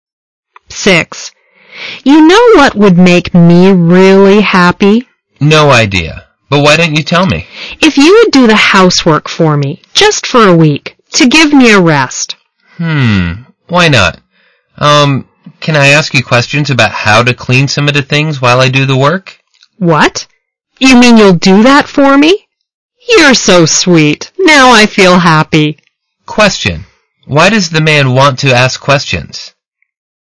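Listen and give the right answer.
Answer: Because he will do the housework and wants to know how to clean some of the things.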